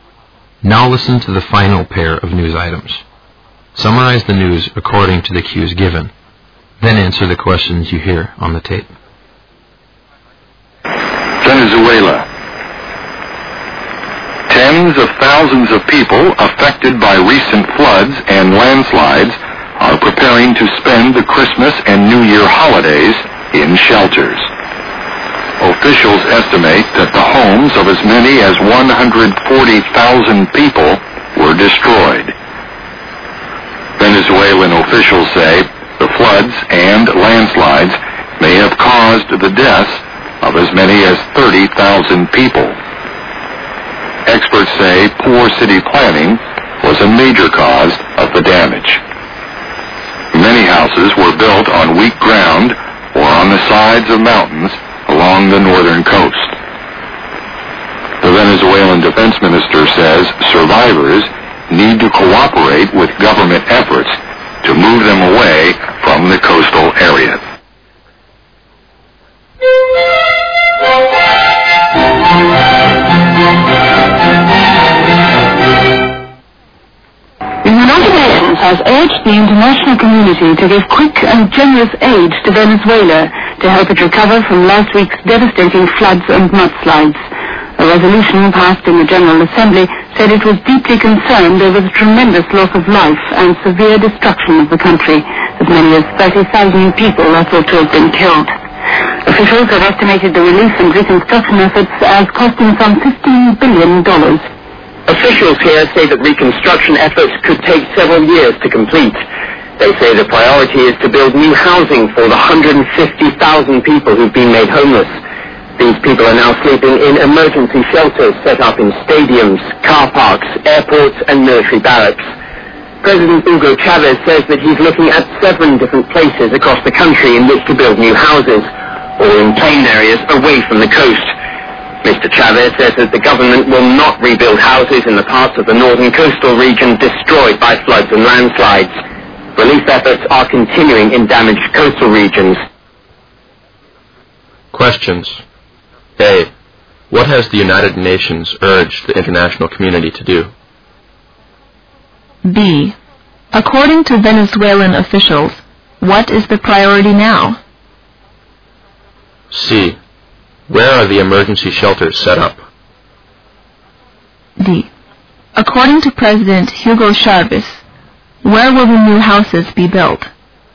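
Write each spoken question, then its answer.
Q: What has the United Nations urged the international community to do?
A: To give quick and generous aid to Venezuela to help it recover from the floods and mudslides

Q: According to Venezuelan officials, what is the priority now?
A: To build new housing for the 150,000 people made homeless

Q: Where are the emergency shelters set up?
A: In stadiums, car parks, airports and military barracks

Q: According to President Hugo Chavez, where will the new houses be built?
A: In seven places across the country, all in plain areas away from the coast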